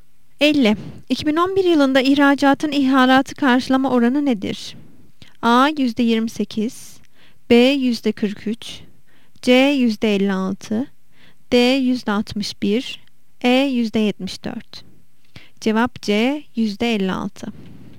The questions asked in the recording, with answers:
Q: 2011 yılında ihracatın ihalatı karşılama oranı nedir?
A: Cevap C. %56.